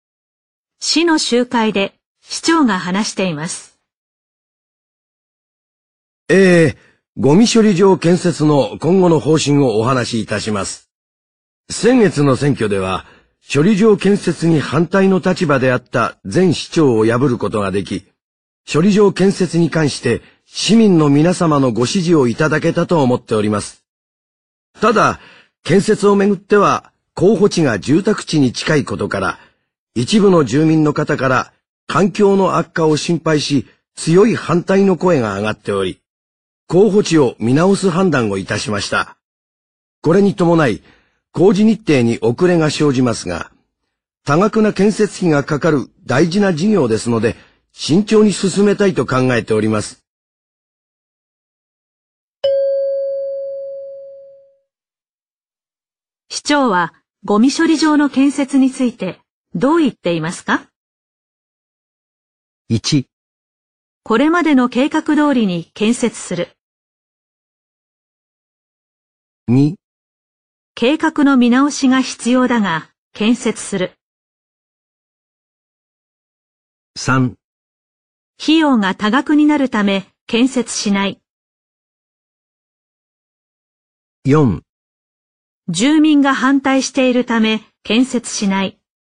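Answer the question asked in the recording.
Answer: 2: 計画の見直しが必要だが建設する。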